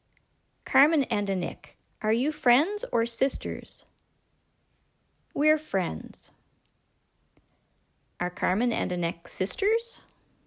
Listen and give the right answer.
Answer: No, they're not sisters. They're friends.